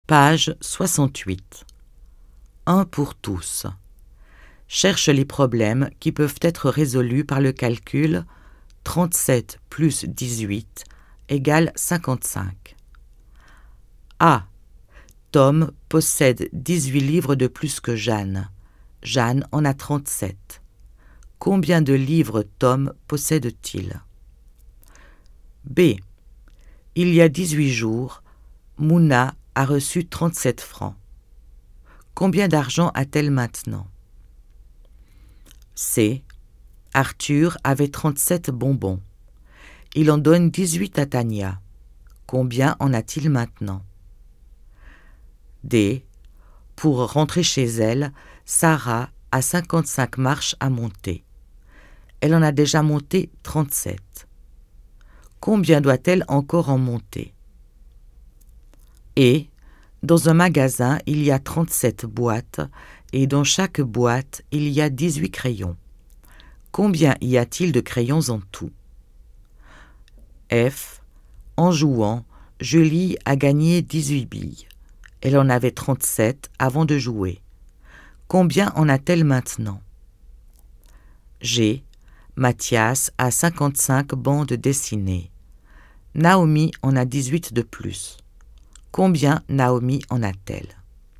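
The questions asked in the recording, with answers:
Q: Cherche les problèmes qui peuvent être résolus par le calcul 37 plus 18 égale 55.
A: A et F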